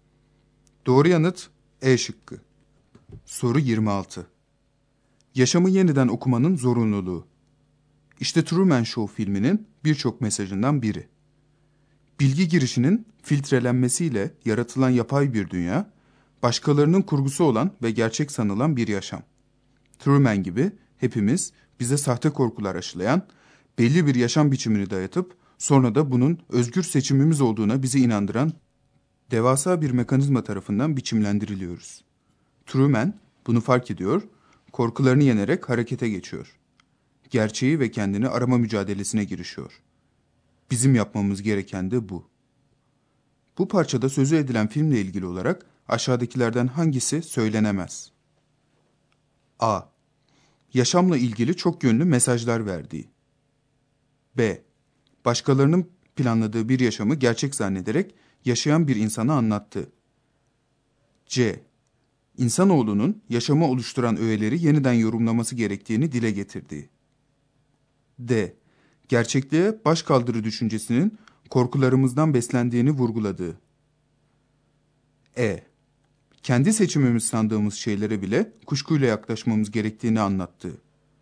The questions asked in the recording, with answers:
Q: Bu parçada sözü edilen filmle ilgili olarak aşağıdakilerden hangisi söylenemez?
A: Doğru yanıt D şıkkı.